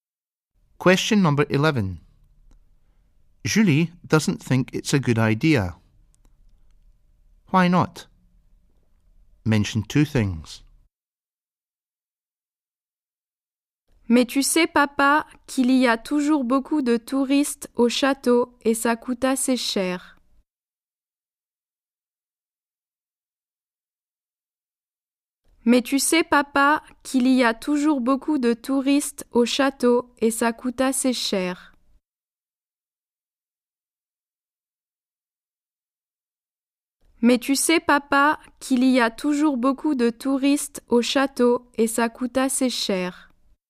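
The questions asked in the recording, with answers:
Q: Why not? Mention two things.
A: There are always lots of tourists at the castle, and it is quite expensive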